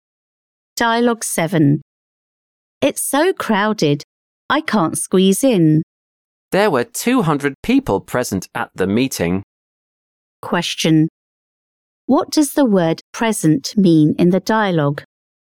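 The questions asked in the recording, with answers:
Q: What does the word present mean in the dialogue?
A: in attendance; there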